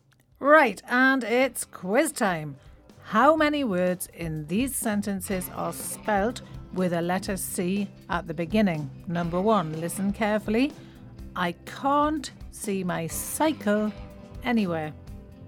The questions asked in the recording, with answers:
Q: How many words in these sentences are spelt with a letter C at the beginning?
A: there were two words with C at the beginning, can't and cycle.